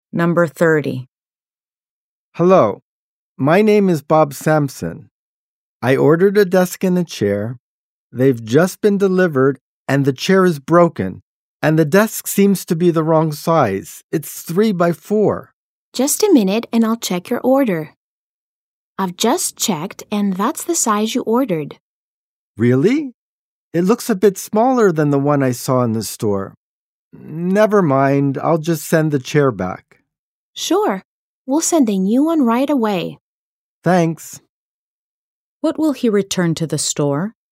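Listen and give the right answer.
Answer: The chair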